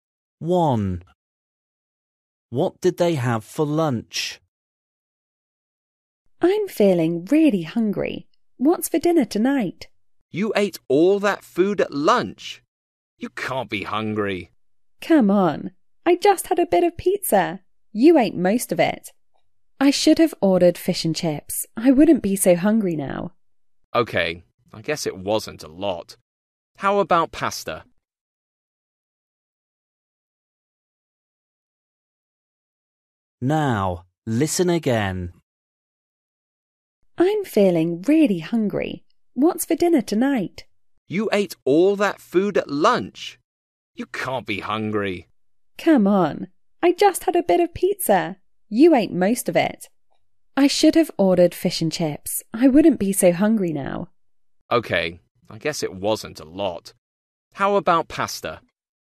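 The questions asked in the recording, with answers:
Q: What did they have for lunch?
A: Pizza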